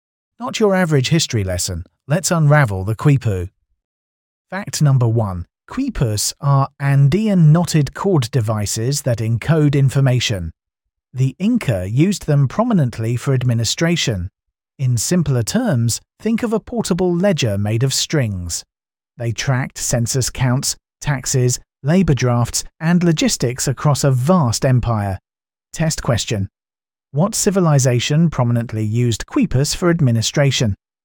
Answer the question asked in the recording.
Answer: Correct answer. Inca.